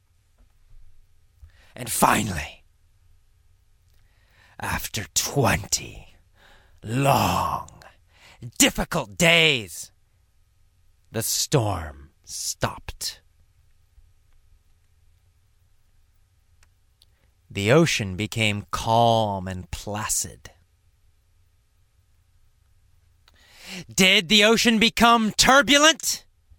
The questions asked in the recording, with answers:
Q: Did the ocean become turbulent?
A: No, it didn't. It became placid, very calm.